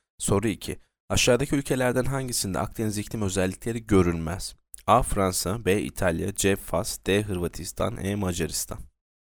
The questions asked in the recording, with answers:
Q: Aşağıdaki ülkelerden hangisinde Akdeniz iklim özellikleri görülmez?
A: Yanıt E. Macaristan.